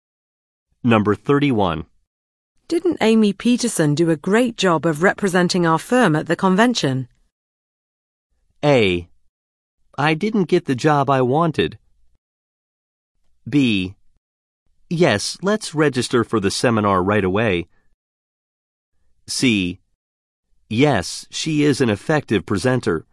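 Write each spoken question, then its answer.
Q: Didn't Amy Peterson do a great job of representing our firm at the convention?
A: C: Yes, she is an effective presenter.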